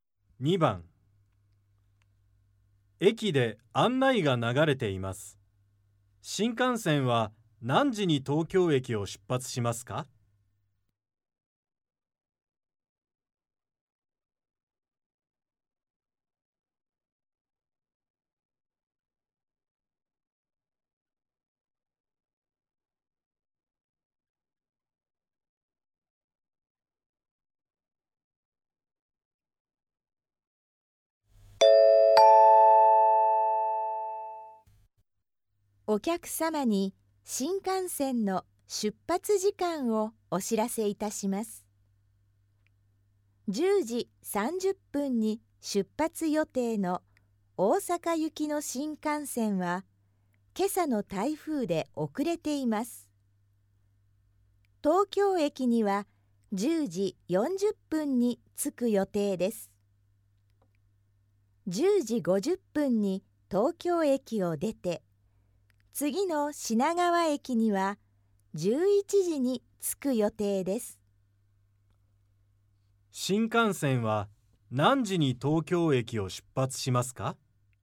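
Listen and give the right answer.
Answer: 10時50分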